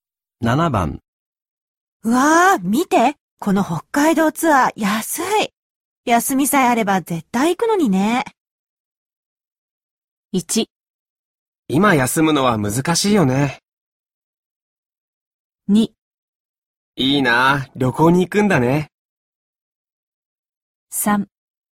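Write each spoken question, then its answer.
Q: うわあ、見て、この北海道ツアー安い。休みさえあれば絶対行くのにね。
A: 1: 今休むのは難しいよね。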